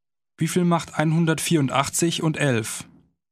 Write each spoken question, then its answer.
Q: Wie viel macht 184 und 11?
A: 195. Das macht 195.